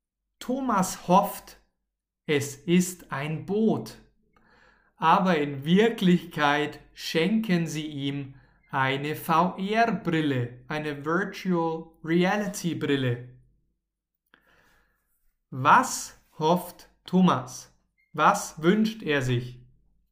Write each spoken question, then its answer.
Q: Was hofft Thomas? Was wünscht er sich?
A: ein Boot. Thomas wünscht sich ein Boot.